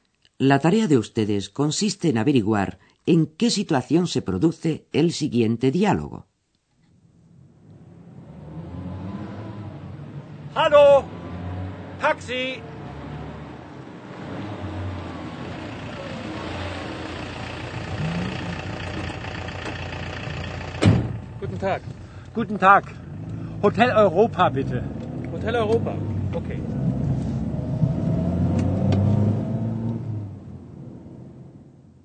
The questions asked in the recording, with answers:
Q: ¿en qué situación se produce el siguiente diálogo?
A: Una persona se encuentra caminando por la calle y detiene un taxi.